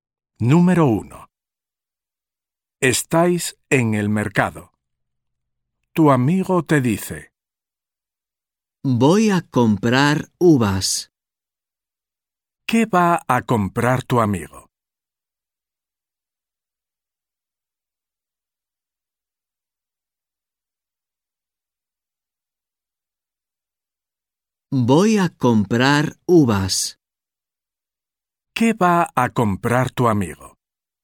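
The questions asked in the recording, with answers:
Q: ¿Qué va a comprar tu amigo?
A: uvas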